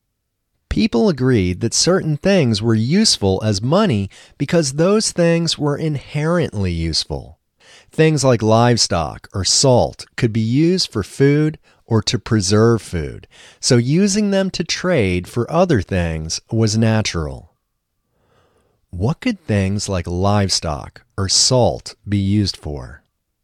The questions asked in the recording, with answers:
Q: What could things like livestock or salt be used for?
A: Things like livestock or salt could be used for food or to preserve food.